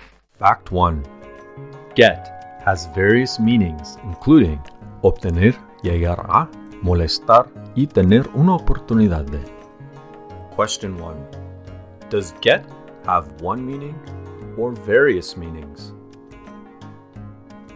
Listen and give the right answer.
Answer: Get has various meanings, including obtener, llegar a, molestar, y tener una oportunidad.